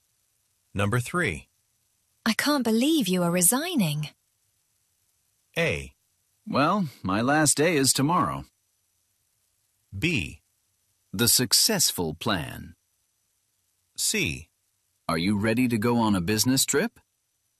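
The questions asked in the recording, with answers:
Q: I can't believe you are resigning.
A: A: Well, my last day is tomorrow.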